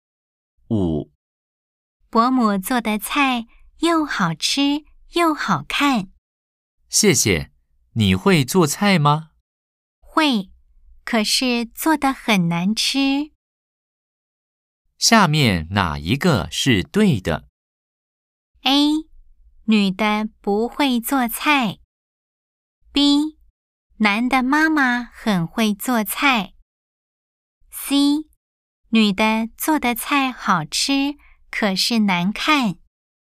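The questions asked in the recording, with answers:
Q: 下面哪一个是对的?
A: B: 男的妈妈很会做菜。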